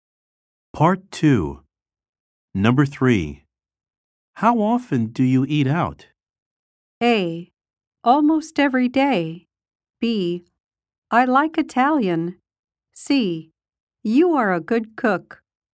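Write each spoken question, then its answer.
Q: How often do you eat out?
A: A: Almost every day.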